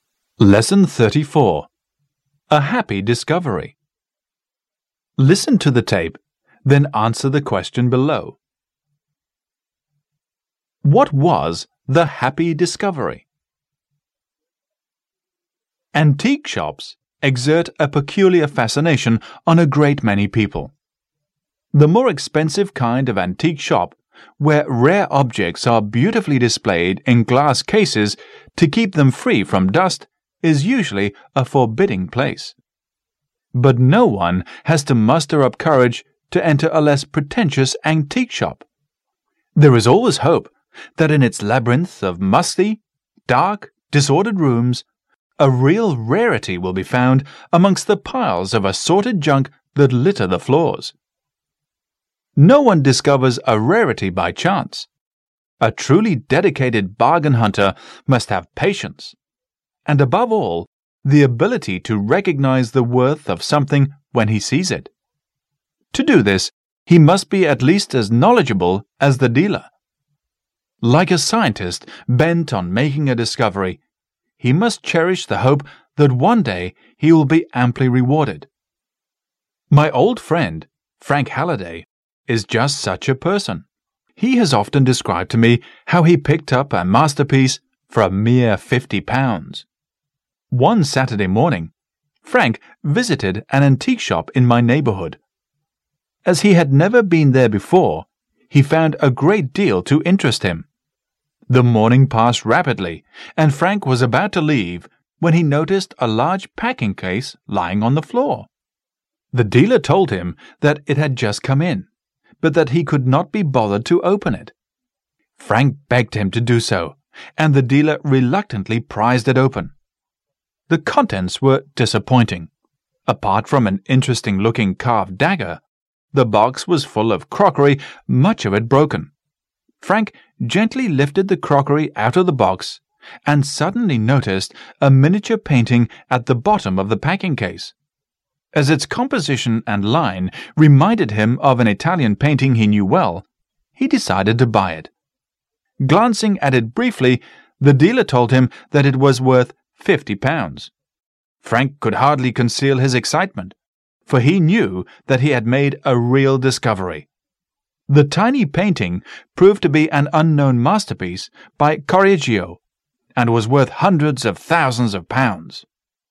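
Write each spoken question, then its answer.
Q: What was the happy discovery?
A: A miniature painting in a packing case that proved to be an unknown masterpiece by Correggio, bought for £50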